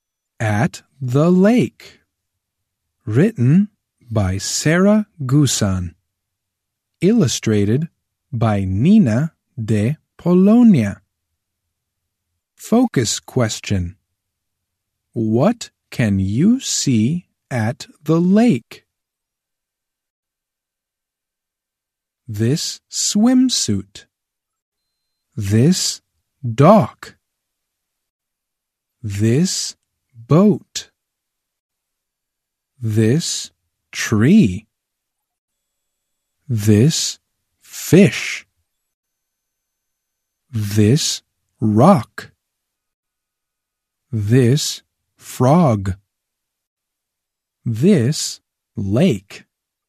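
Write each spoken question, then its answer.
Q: What can you see at the lake?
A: A swimsuit, a dock, a boat, a tree, a fish, a rock, a frog and the lake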